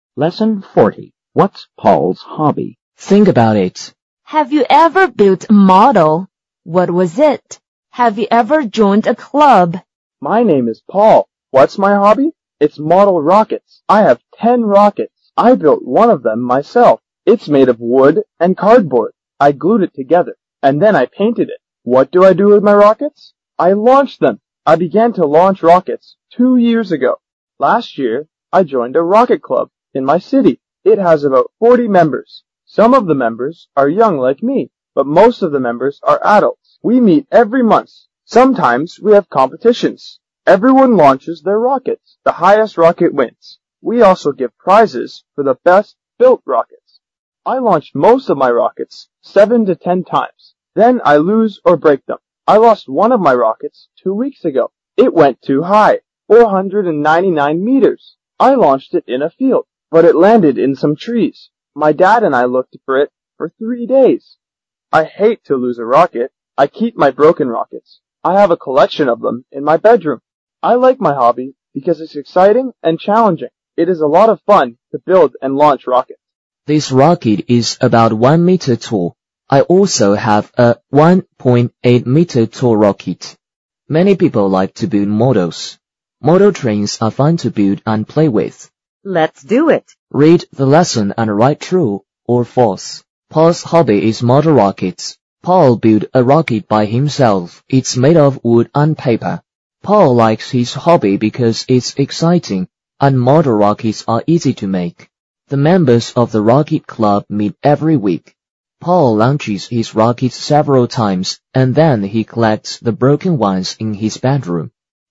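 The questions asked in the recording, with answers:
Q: Paul's hobby is model rockets.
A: True

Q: Paul built a rocket by himself.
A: True

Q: Paul likes his hobby because it's exciting and model rockets are easy to make.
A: False

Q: The members of the rocket club meet every week.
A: False

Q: Paul launches his rockets several times and then he collects the broken ones in his bedroom.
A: True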